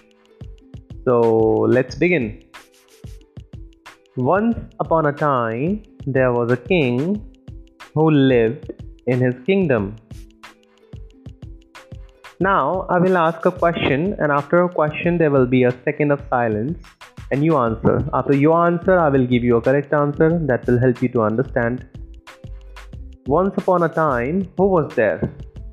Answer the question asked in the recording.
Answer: Once upon a time, there was a king.